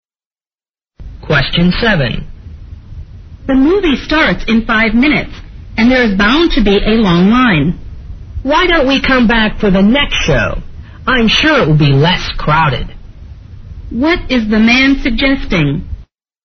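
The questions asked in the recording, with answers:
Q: What is the man suggesting?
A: Coming back for the next show, which will be less crowded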